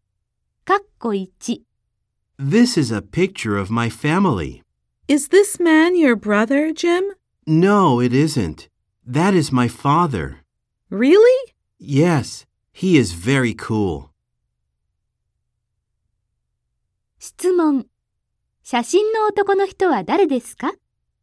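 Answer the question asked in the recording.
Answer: ジムのお父さん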